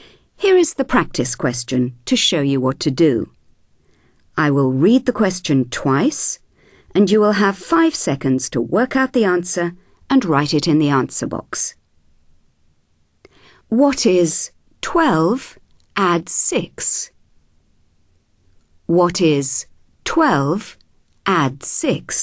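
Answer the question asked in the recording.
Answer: 18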